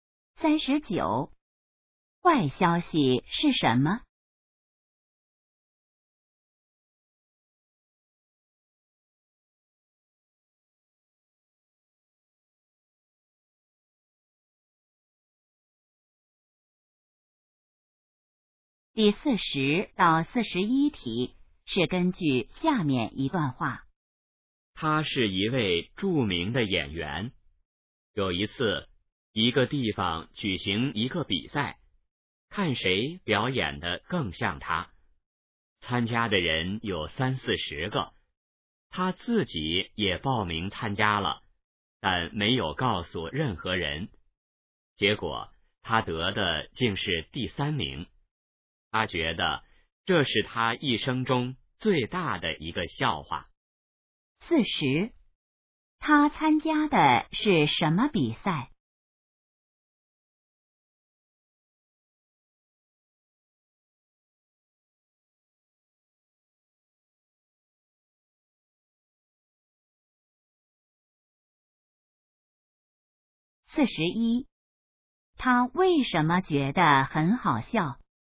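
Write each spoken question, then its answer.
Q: 他参加的是什么比赛?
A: 看谁表演得更像他的比赛

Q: 他为什么觉得很好笑?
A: 他自己只得了第三名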